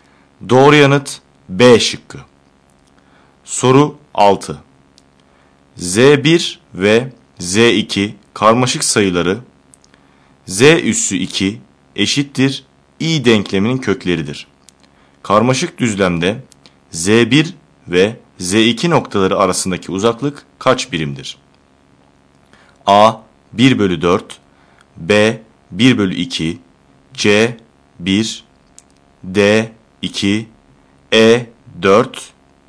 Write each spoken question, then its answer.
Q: Karmaşık düzlemde Z1 ve Z2 noktaları arasındaki uzaklık kaç birimdir?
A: Doğru yanıt D şıkkı.